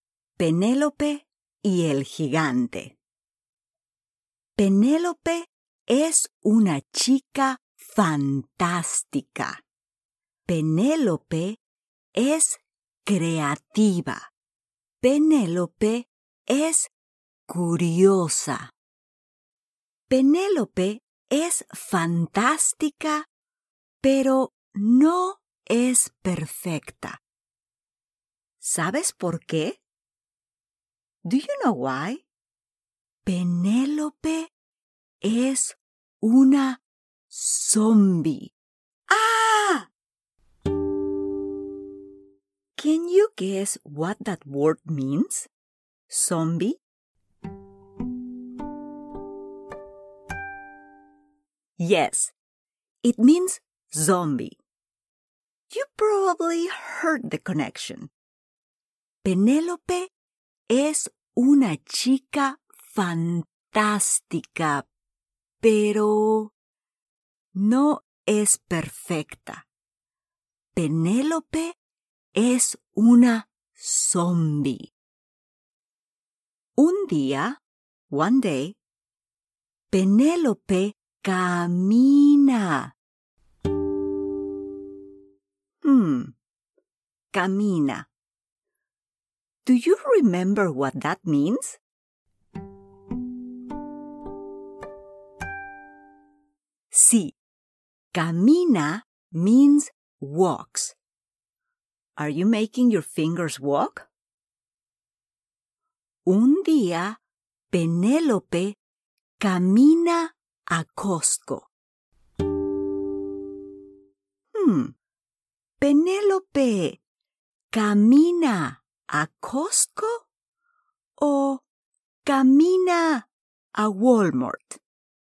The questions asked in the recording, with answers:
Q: Hmm, Penélope camina a Costco o camina a Walmart.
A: Sí, a Costco.